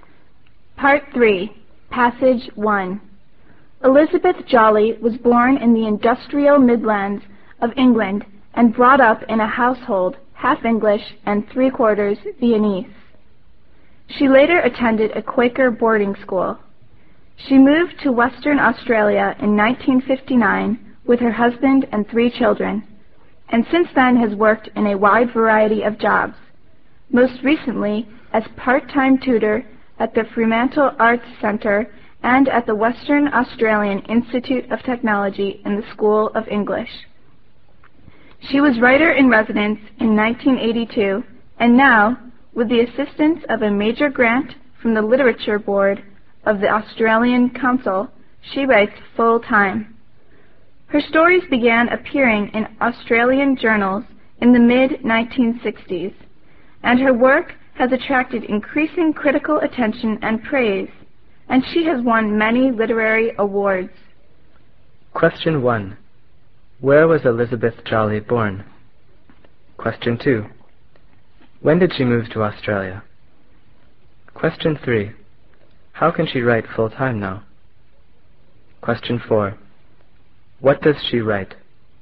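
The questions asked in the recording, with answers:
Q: Where was Elizabeth Jolly born?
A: In the industrial Midlands of England

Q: When did she move to Australia?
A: In 1959

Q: How can she write full-time now?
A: With a major grant from the Literature Board of the Australian Council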